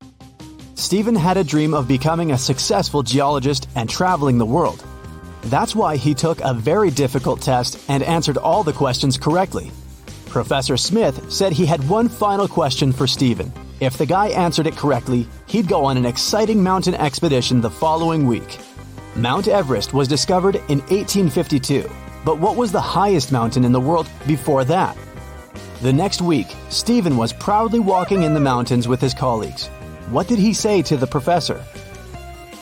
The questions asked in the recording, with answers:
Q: What did he say to the professor?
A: Stephen said it was Mount Everest.